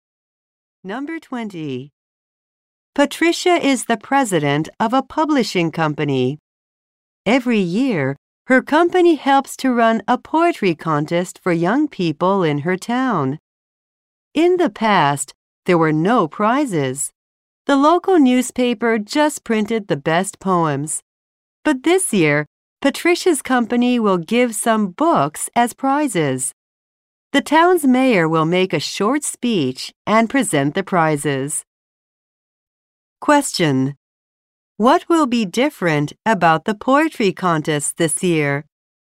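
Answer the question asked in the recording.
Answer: Books will be given as prizes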